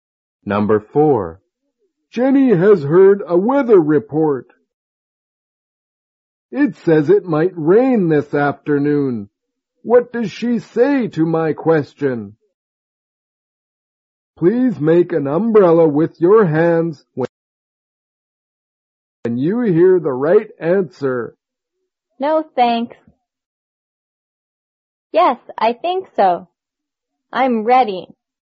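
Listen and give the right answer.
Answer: Yes, I think so.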